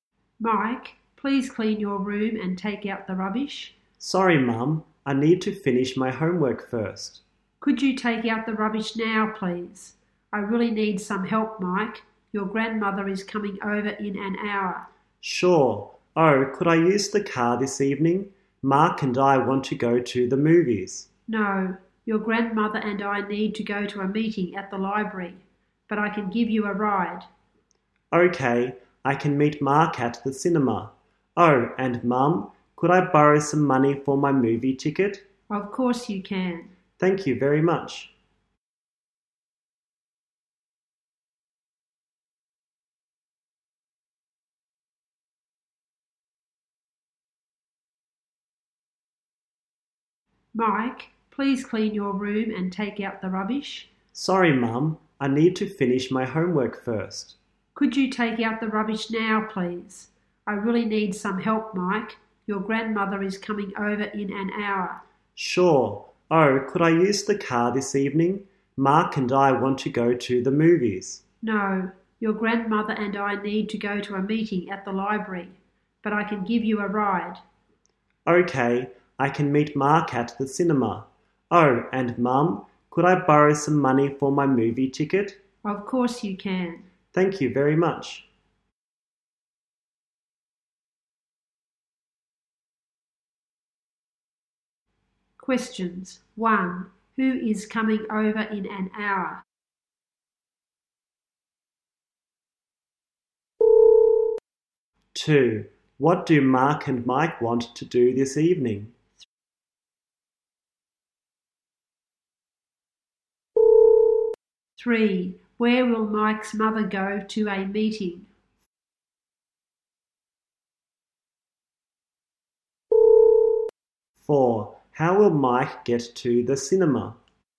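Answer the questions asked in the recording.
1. Mike's grandmother.
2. Go to the movies.
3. At the library.
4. His mother will give him a ride (by car).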